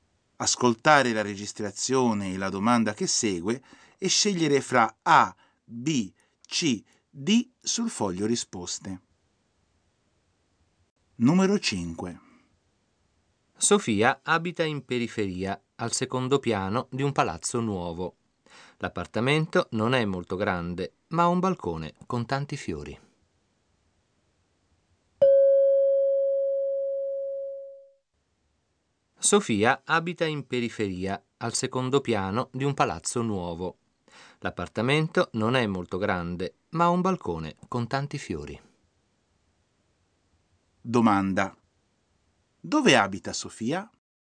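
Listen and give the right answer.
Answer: In periferia, al secondo piano di un palazzo nuovo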